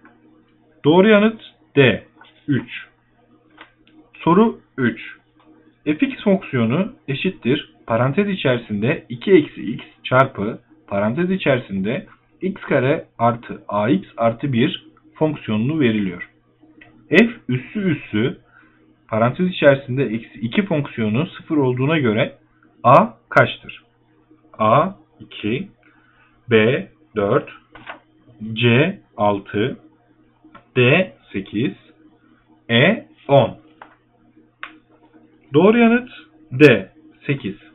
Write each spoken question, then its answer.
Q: F üssü üssü parantez içerisinde eksi 2 fonksiyonu 0 olduğuna göre A kaçtır?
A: Doğru yanıt D 8.